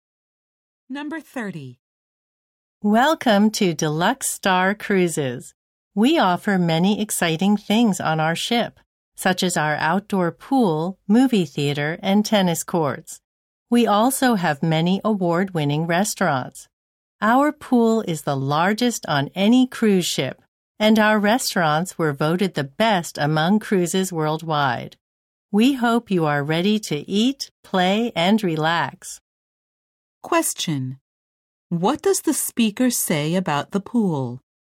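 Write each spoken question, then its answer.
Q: What does the speaker say about the pool?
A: It is the largest on any cruise ship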